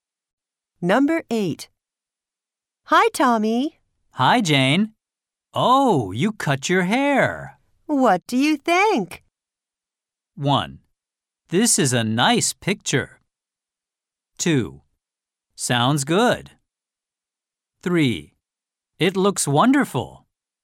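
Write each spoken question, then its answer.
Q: What do you think?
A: 3: It looks wonderful.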